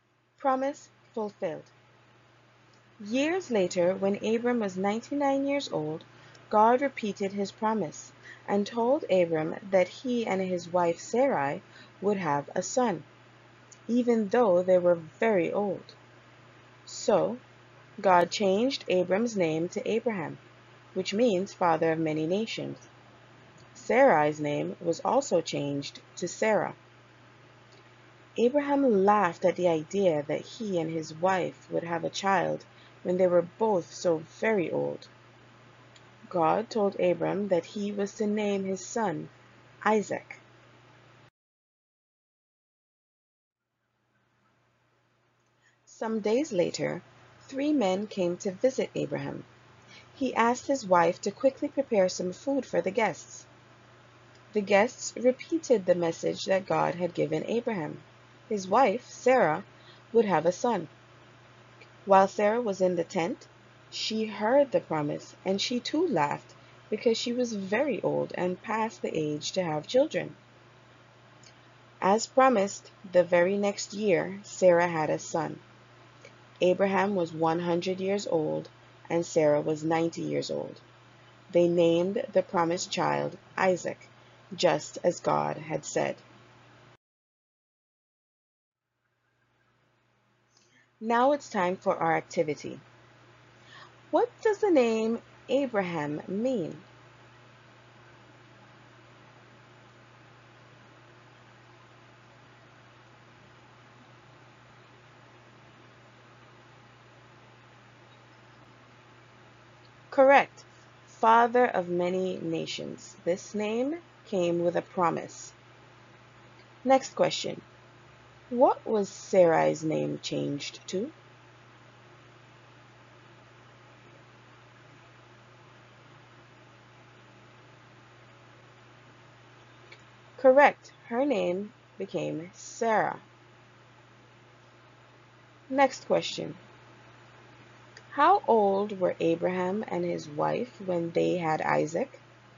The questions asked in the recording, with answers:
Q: What does the name Abraham mean?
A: Father of many nations.

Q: How old were Abraham and his wife when they had Isaac?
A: Abraham was 100 years old and Sarah was 90.